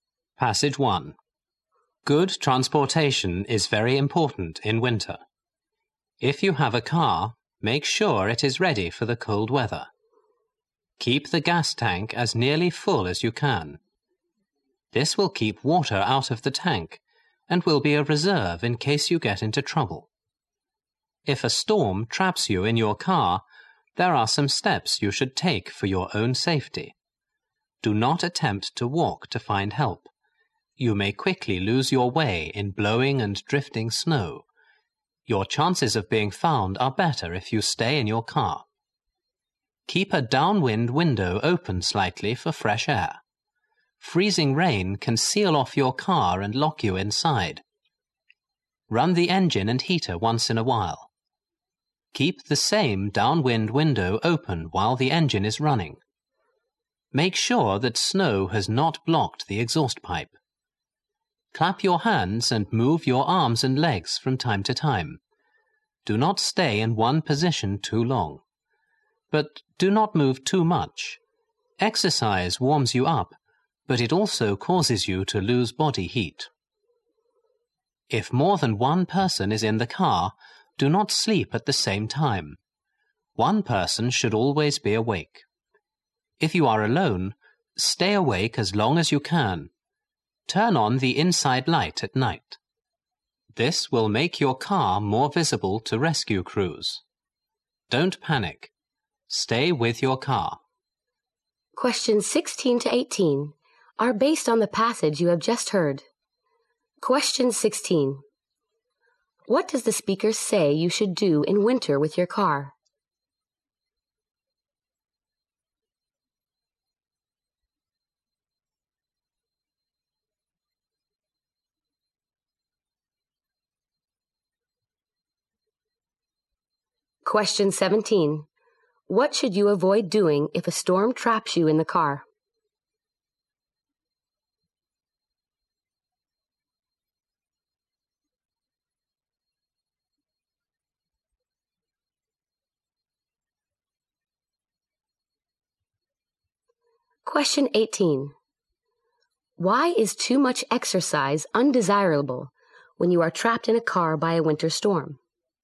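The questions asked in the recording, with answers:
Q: What does the speaker say you should do in winter with your car?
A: Keep the gas tank as nearly full as possible.

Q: What should you avoid doing if a storm traps you in the car?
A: Walking to find help.

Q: Why is too much exercise undesirable when you are trapped in a car by a winter storm?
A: It causes you to lose body heat.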